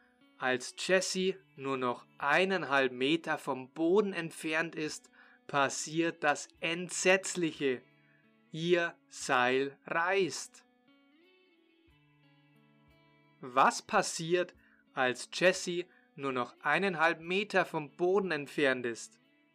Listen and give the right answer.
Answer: Das Entsetzliche, als Jesse nur noch eineinhalb Meter vom Boden entfernt ist, passiert das Entsetzliche, ihr Seil reißt.